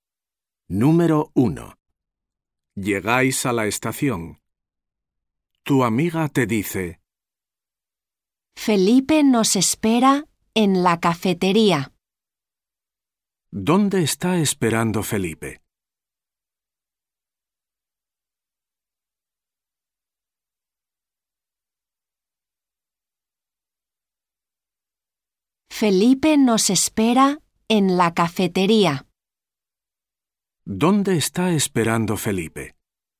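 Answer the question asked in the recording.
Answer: En la cafetería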